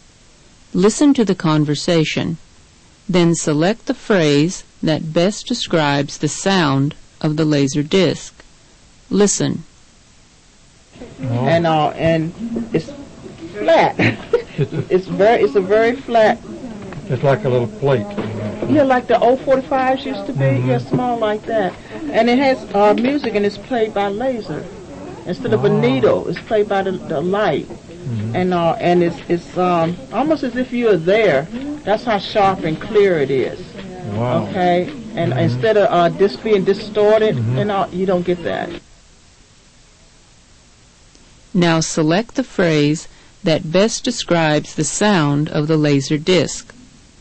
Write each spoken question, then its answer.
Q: Now select the phrase that best describes the sound of the laser disc.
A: The answer is B. It's sharp and clear.